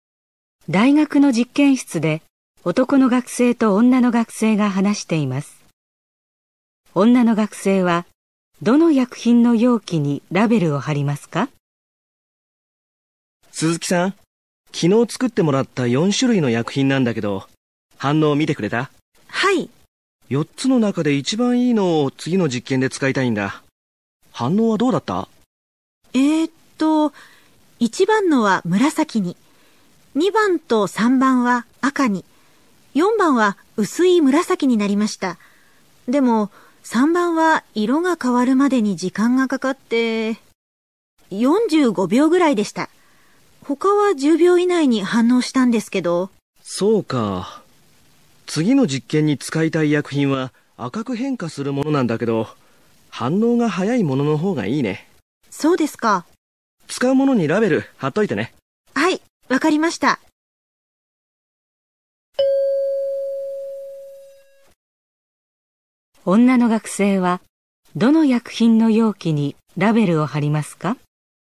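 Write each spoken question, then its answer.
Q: 女の学生はどの薬品の容器にラベルを貼りますか?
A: 2番の薬品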